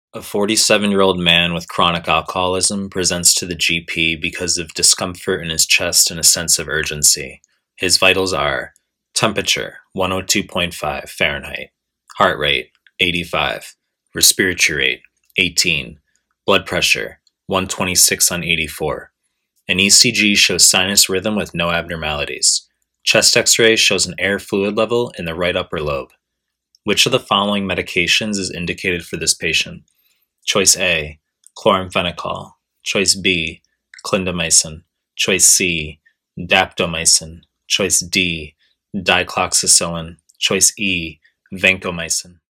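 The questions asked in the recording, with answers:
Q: Which of the following medications is indicated for this patient?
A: B: clindamycin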